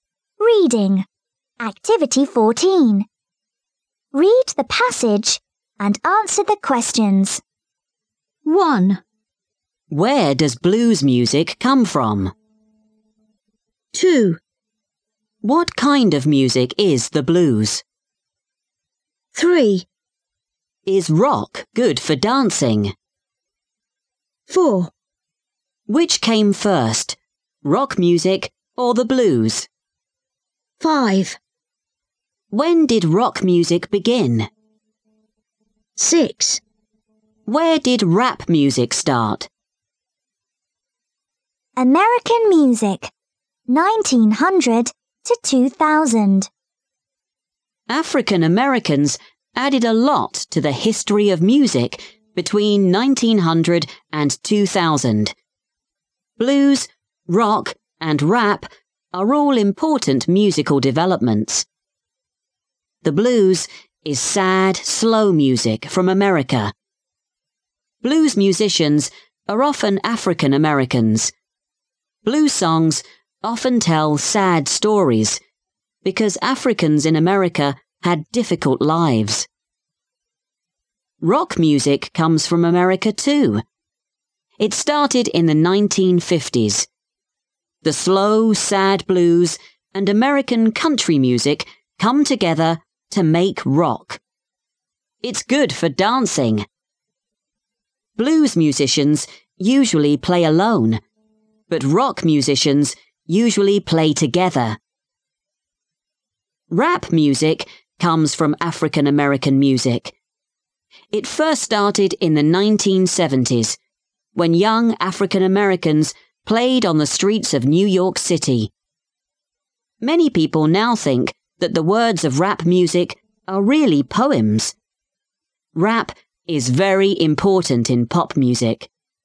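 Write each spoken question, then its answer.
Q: Where does blues music come from?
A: America

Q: What kind of music is the blues?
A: Sad, slow music

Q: Is rock good for dancing?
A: Yes

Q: Which came first, rock music or the blues?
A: The blues

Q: When did rock music begin?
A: In the 1950s

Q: Where did rap music start?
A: On the streets of New York City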